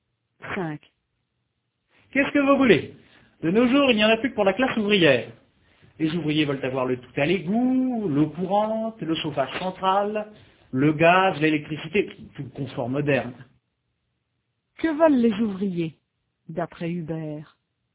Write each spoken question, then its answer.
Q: Que veulent les ouvriers, d'après Hubert?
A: Ils veulent tout le confort moderne, le tout à l'égout, l'eau courante, le chauffage central, le gaz, l'électricité.